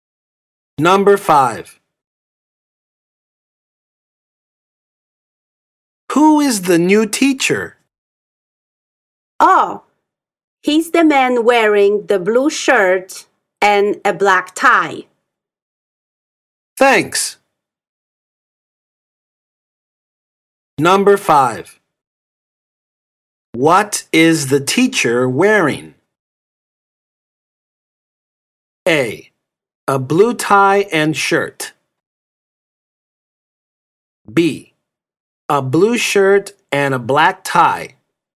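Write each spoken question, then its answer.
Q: What is the teacher wearing?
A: B: A blue shirt and a black tie.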